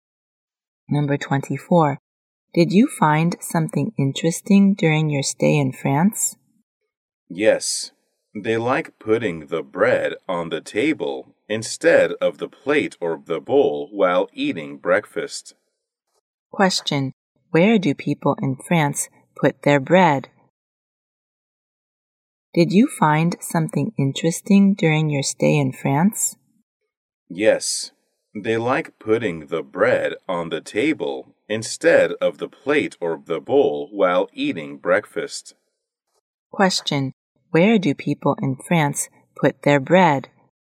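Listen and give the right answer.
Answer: On the table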